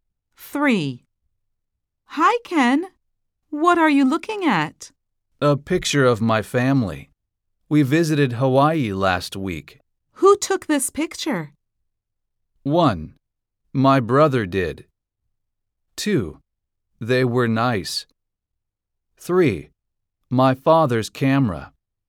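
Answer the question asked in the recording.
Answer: 1: My brother did.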